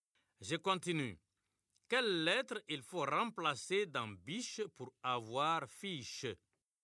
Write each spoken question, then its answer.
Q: Quelle lettre il faut remplacer dans biche pour avoir fiche?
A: Monsieur, c'est la lettre B.